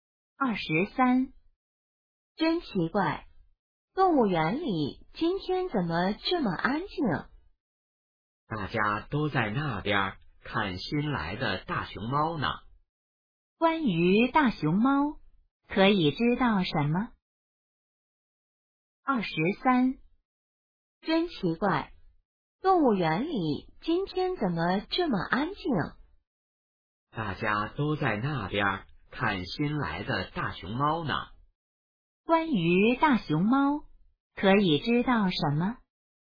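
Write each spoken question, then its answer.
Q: 关于大熊猫,可以知道什么?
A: 是新来的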